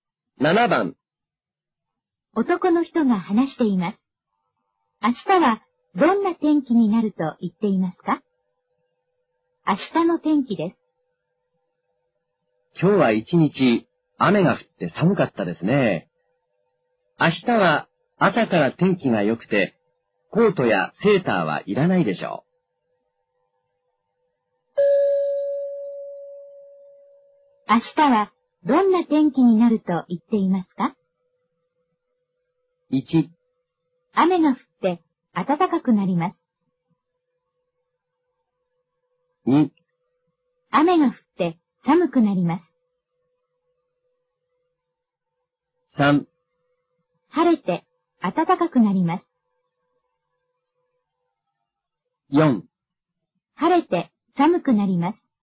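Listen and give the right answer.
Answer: 3: 晴れて暖かくなります。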